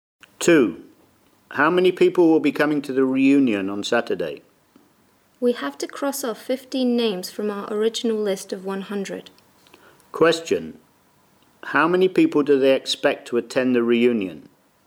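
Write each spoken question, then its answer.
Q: How many people do they expect to attend the reunion?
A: 85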